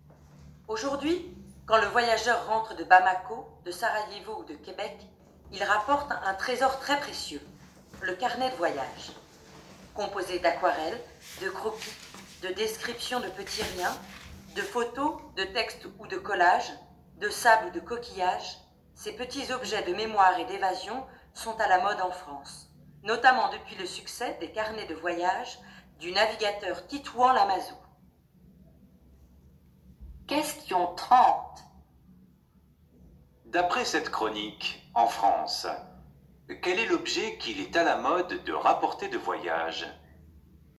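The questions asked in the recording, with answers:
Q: D'après cette chronique, en France, quel est l'objet qu'il est à la mode de rapporter de voyage ?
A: Le carnet de voyage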